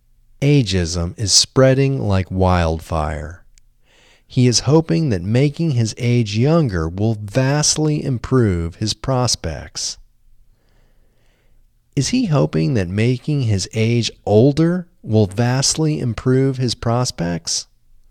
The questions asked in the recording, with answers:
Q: Is he hoping that making his age older will vastly improve his prospects?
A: No, he isn't hoping that making his age older will vastly improve his prospects.